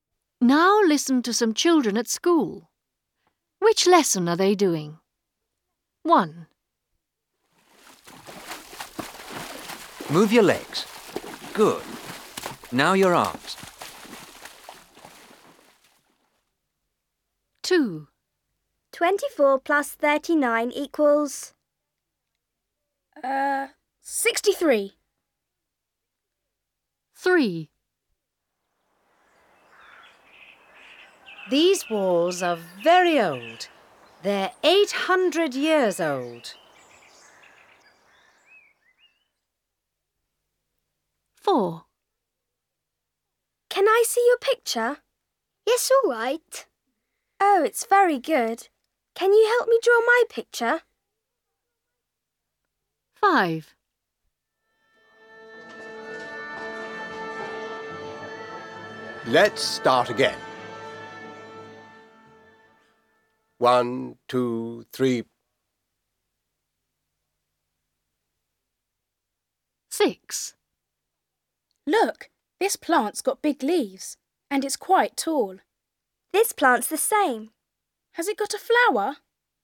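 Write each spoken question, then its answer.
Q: Which lesson are they doing?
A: Maths

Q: Which lesson are they doing?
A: History

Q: Which lesson are they doing?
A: Art

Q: Which lesson are they doing?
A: Science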